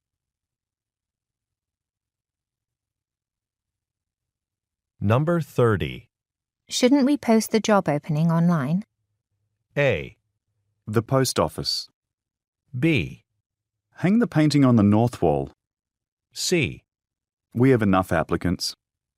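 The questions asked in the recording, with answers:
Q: Shouldn't we post the job opening online?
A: C: We have enough applicants.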